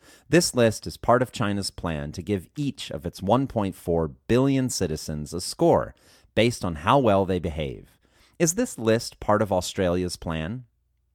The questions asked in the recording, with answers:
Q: Is this list part of Australia's plan?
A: No, this list is not part of Australia's plan.